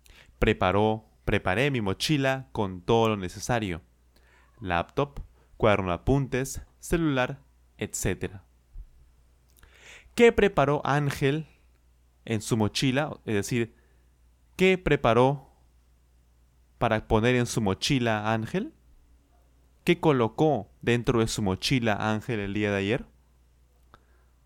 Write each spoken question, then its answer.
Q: ¿Qué preparó Ángel en su mochila?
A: Sí, sí, él colocó dentro de su mochila una laptop, su cuaderno de apuntes y un celular, entre otras cosas, por supuesto.